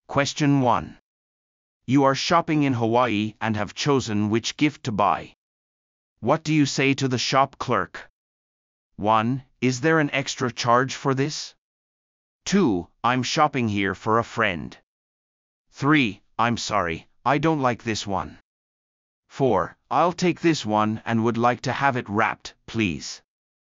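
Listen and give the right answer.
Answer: 4: I'll take this one and would like to have it wrapped, please.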